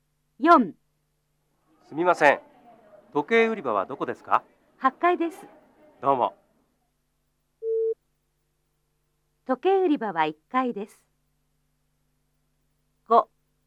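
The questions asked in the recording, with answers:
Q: 時計売り場は1階です。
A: ×(8階です)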